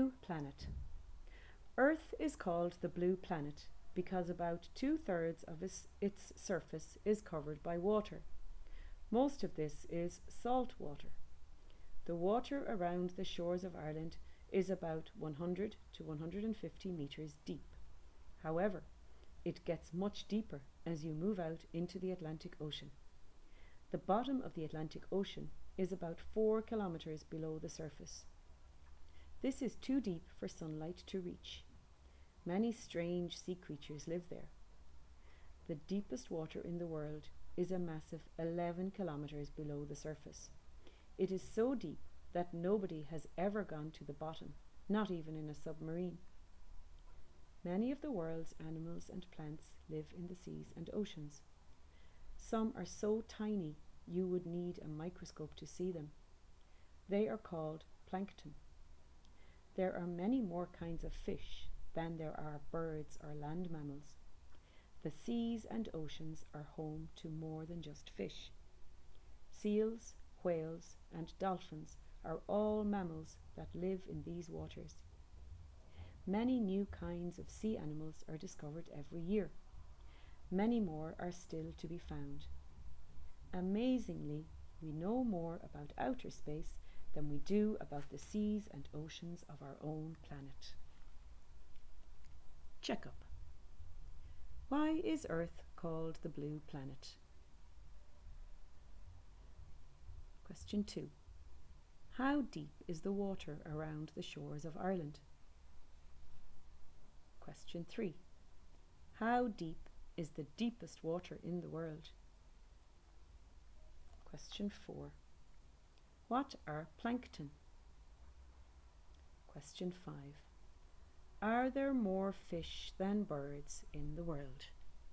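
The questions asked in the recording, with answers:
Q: Why is Earth called the Blue Planet?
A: Because about two-thirds of its surface is covered by water

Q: How deep is the water around the shores of Ireland?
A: About 100 to 150 metres deep

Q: How deep is the deepest water in the world?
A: 11 kilometres below the surface

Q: What are plankton?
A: Tiny sea animals and plants you need a microscope to see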